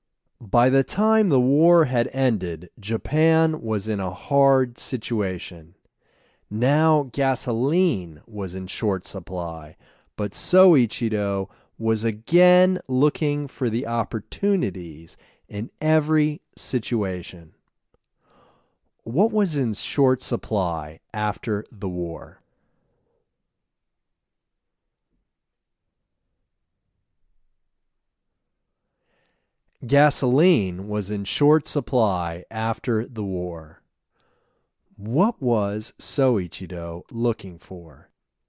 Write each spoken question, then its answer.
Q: What was in short supply after the war?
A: Gasoline was in short supply after the war.

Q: What was Soichiro looking for?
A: Soichiro was looking for opportunities.